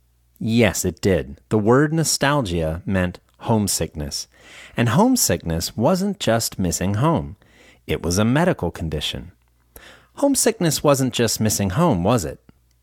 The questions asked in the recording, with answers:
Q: Homesickness wasn't just missing home, was it?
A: No, it wasn't. It was a medical condition.